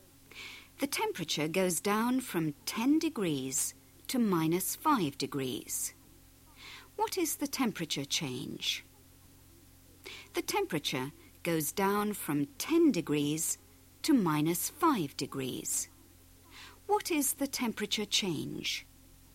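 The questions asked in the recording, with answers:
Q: What is the temperature change?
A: 15 degrees (down)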